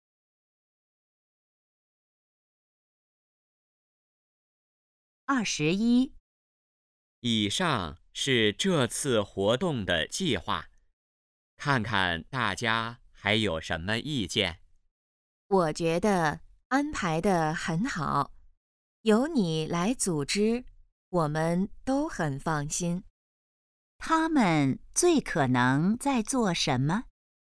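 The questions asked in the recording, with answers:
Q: 他们最可能在做什么?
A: 讨论活动计划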